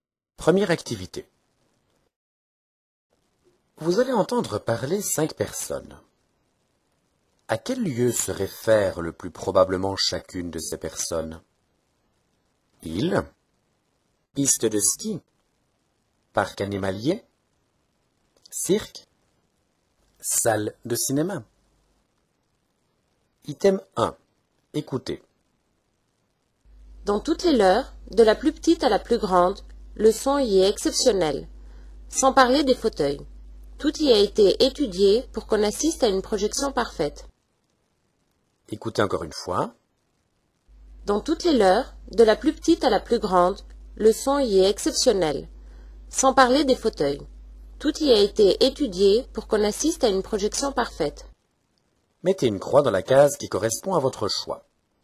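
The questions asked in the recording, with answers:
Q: À quel lieu se réfère le plus probablement chacune de ces personnes?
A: Salle de cinéma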